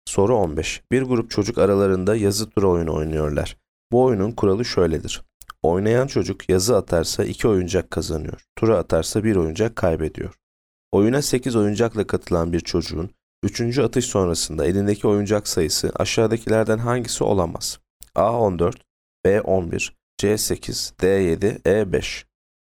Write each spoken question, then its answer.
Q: atış sonrasında elindeki oyuncak sayısı aşağıdakilerden hangisi olamaz?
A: Yanıt D 7.